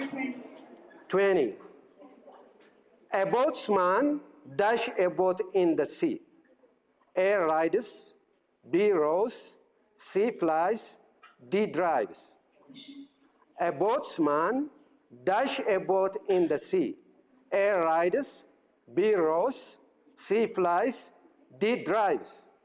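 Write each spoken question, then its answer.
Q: A boatsman dash a boat in the sea.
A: B: rows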